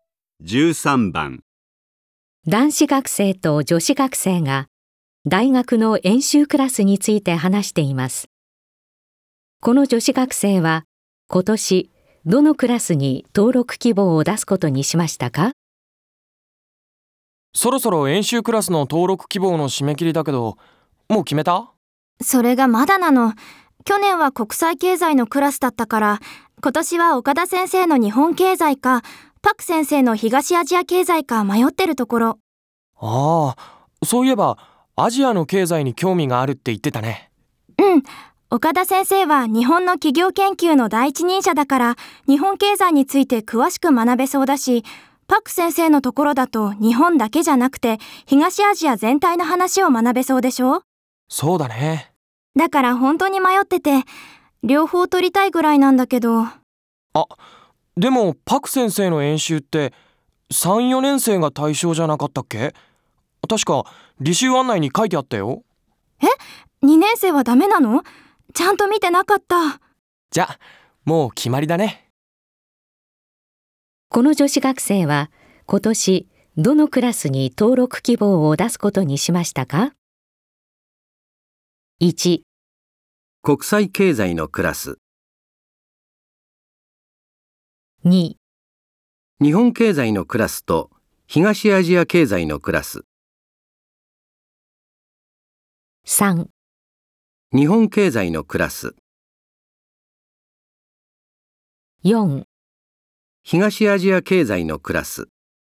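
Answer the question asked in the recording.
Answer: 3: 日本経済のクラス。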